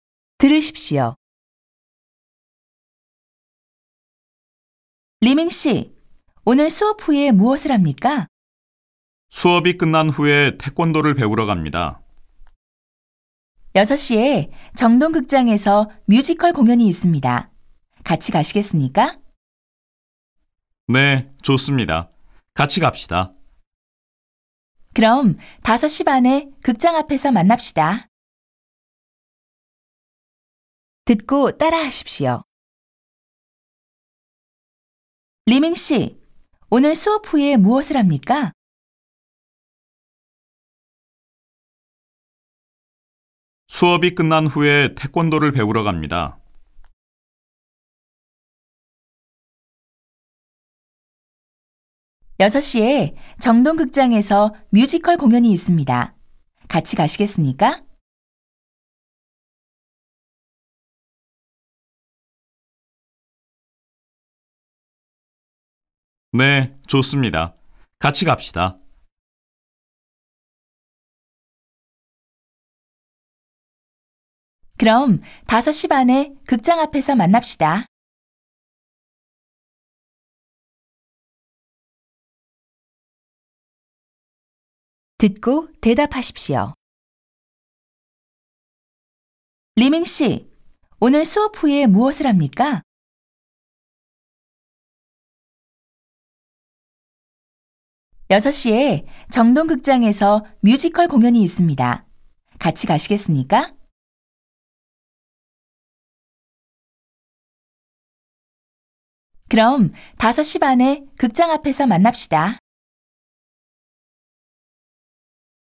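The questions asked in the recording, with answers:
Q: 리밍 씨, 오늘 수업 후에 무엇을 합니까?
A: 수업이 끝난 후에 태권도를 배우러 갑니다.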